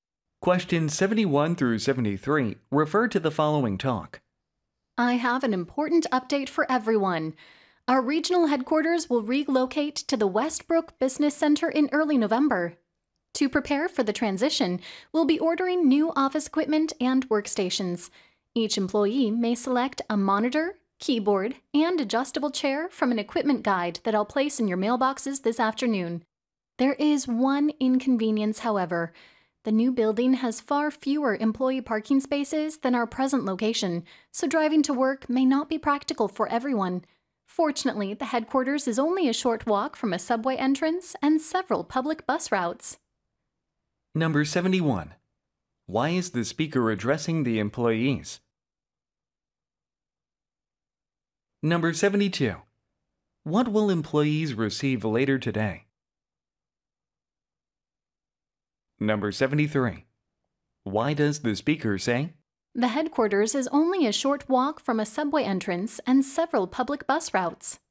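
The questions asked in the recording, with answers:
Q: Why is the speaker addressing the employees?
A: To announce the headquarters' relocation

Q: What will employees receive later today?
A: An equipment guide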